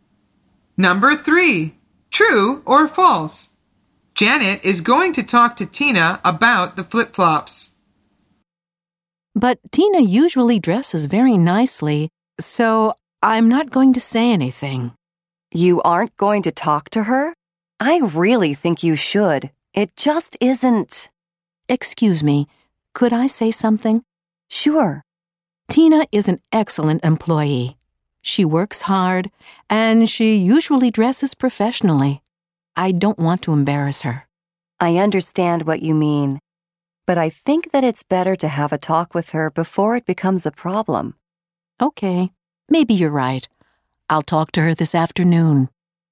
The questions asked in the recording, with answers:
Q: True or false? Janet is going to talk to Tina about the flip-flops.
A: The answer is true.